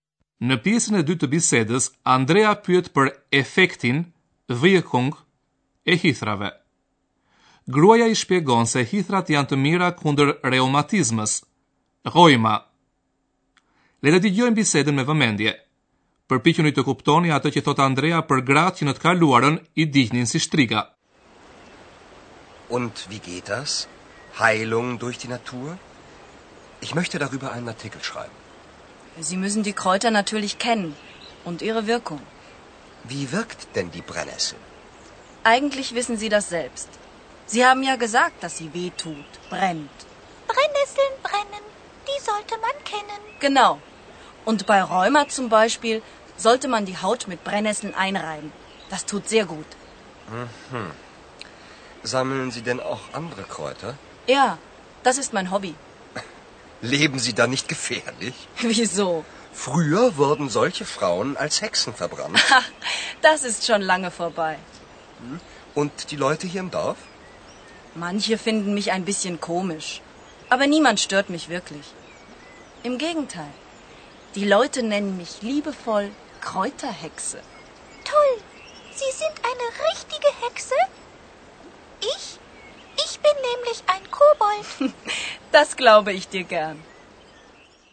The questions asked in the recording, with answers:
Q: Përpiquni të kuptoni atë që thot Andrea për gratë që në të kaluarën i dihnin si shtriga.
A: Andrea thot se gratë që mblidhnin bara dhe bimi eksore në të kaluar një dihnin si shtriga me qenë se besoj se ato kishin fuqi magjistaresh.